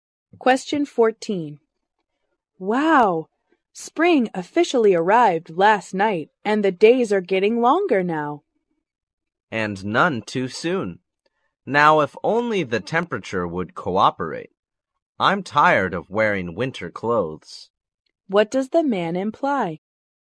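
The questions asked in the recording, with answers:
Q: What does the man imply?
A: He wishes it would get warmer.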